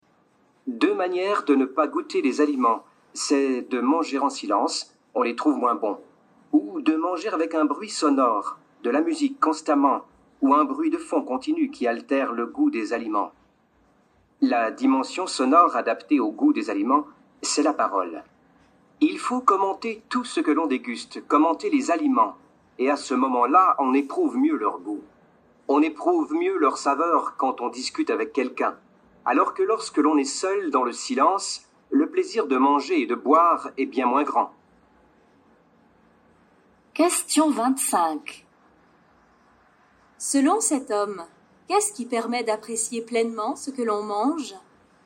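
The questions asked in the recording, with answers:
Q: Selon cet homme, qu'est-ce qui permet d'apprécier pleinement ce que l'on mange ?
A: Parler, commenter les aliments avec quelqu'un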